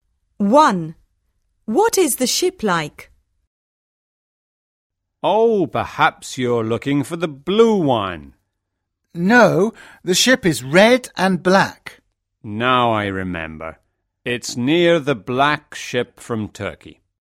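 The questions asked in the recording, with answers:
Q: What is the ship like?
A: It is red and black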